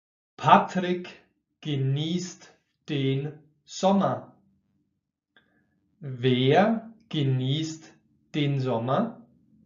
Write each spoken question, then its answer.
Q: Wer genießt den Sommer?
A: Patrick natürlich. Er genießt den Sommer.